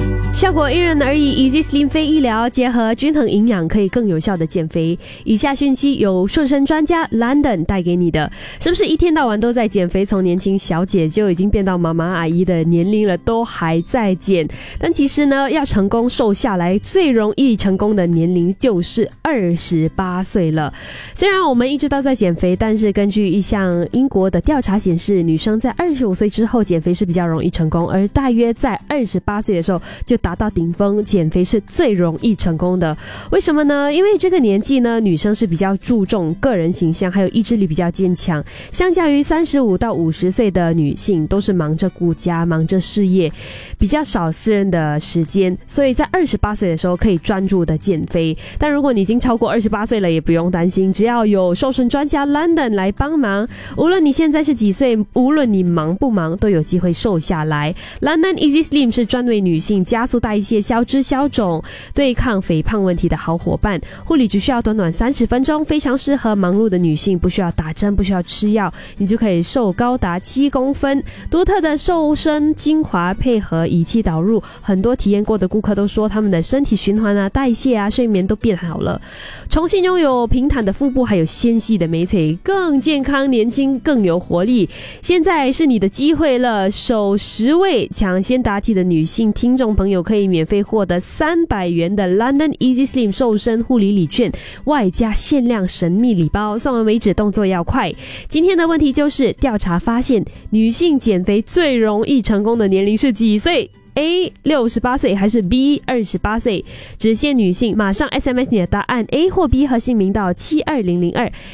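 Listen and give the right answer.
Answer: B: 28岁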